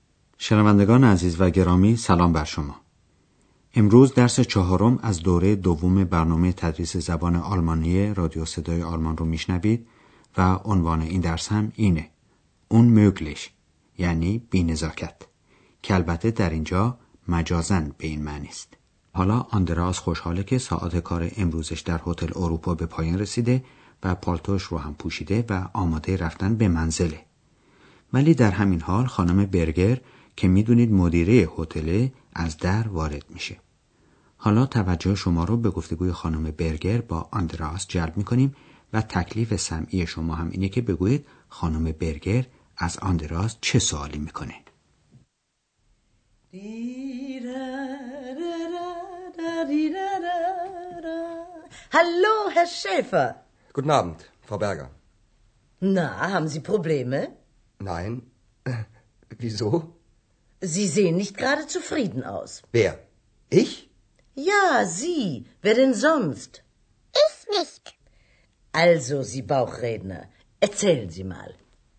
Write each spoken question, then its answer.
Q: تکلیف سمعی شما هم اینه که بگویید خانم برگر از آندراس چه سوالی میکنه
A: پس سوال خانم برگر از آندراس این بود که آیا او مشکل و مسئله ای داره؟